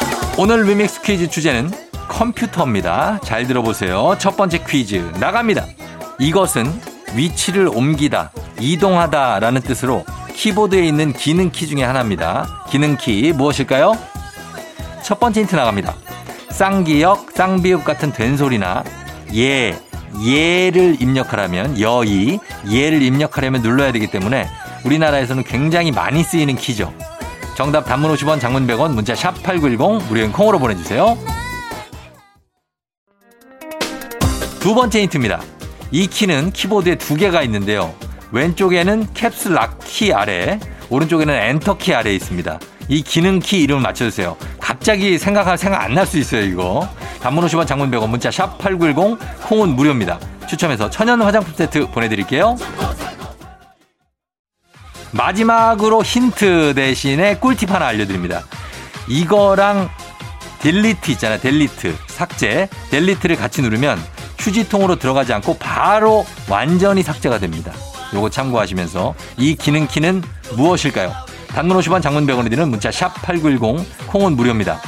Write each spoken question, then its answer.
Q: 요거 참고하시면서 이 기능키는 무엇일까요?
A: 정답은 바로 두구두구두구두구두구두구 시프트 키입니다.